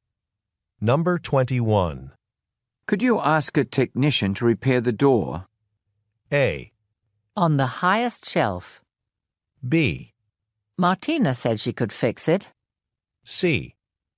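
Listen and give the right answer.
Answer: B: Martina said she could fix it.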